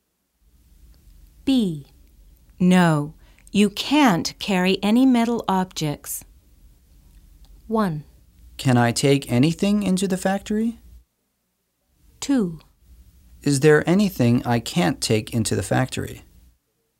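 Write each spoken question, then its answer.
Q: No. You can't carry any metal objects.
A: 1: Can I take anything into the factory?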